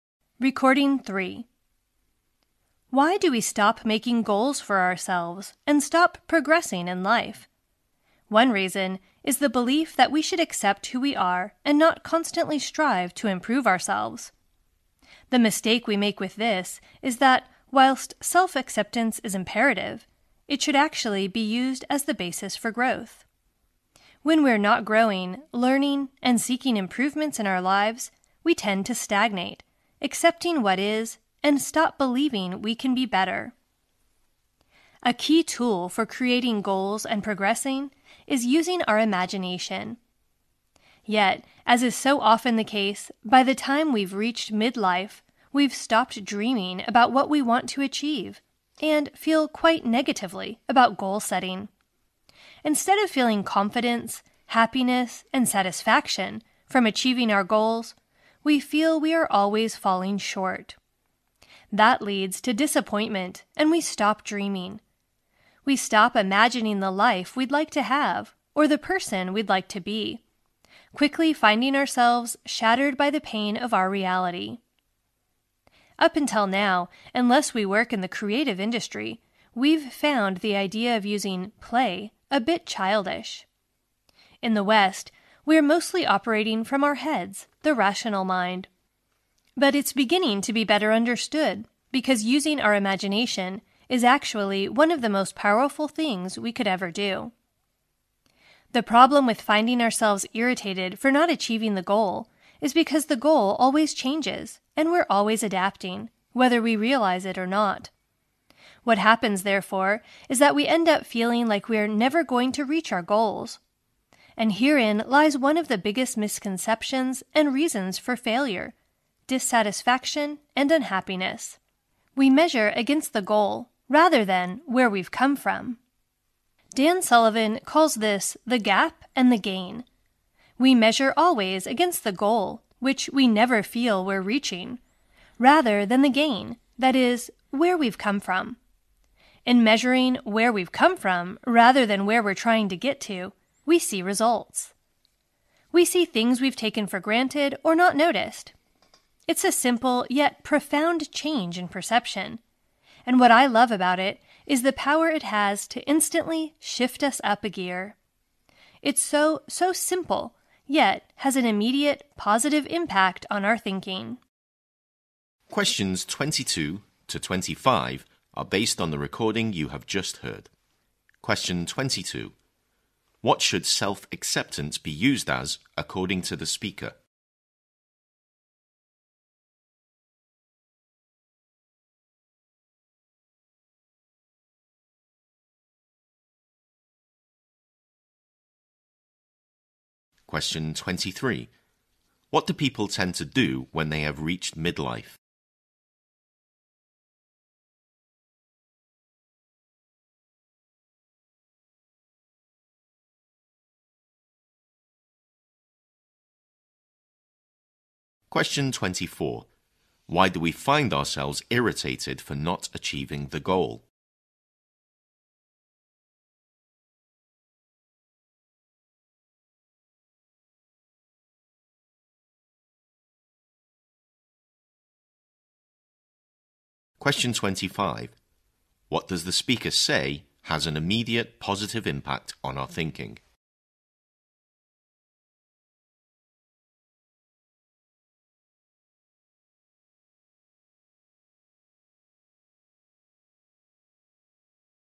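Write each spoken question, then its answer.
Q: What should self-acceptance be used as, according to the speaker?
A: The basis for growth.

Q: What do people tend to do when they have reached midlife?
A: Stop dreaming about what they want to achieve and feel negative about goal setting.

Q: Why do we find ourselves irritated for not achieving the goal?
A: Because the goal always changes and we're always adapting.

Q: What does the speaker say has an immediate positive impact on our thinking?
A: Measuring where we've come from rather than against the goal.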